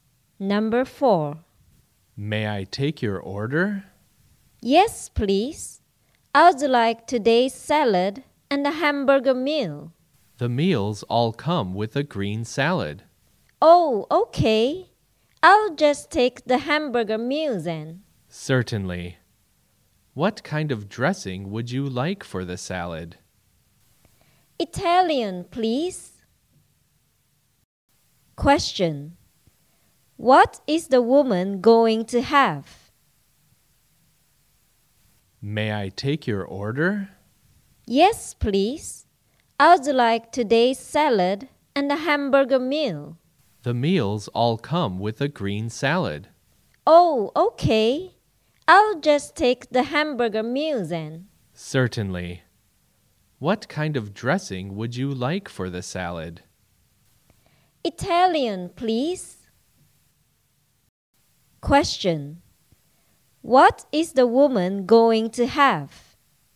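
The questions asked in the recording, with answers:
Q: What is the woman going to have?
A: A hamburger meal with a green salad and Italian dressing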